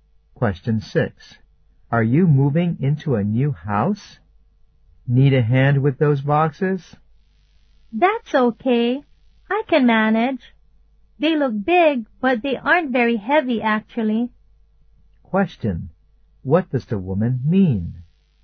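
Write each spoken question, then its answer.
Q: What does the woman mean?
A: She doesn't need any help, because the boxes aren't heavy.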